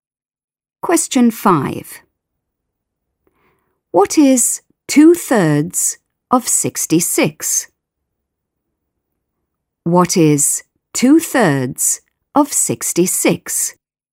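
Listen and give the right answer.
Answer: 44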